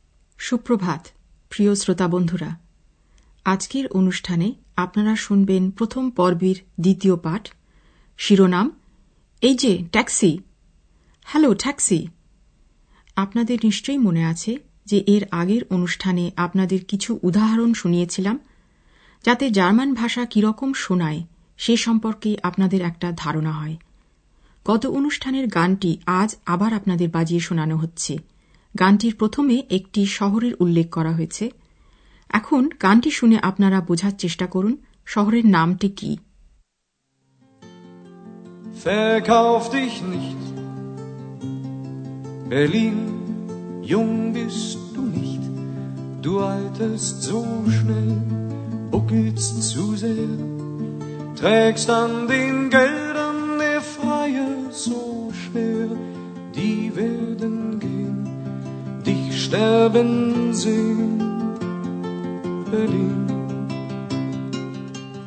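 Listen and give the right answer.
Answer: Berlin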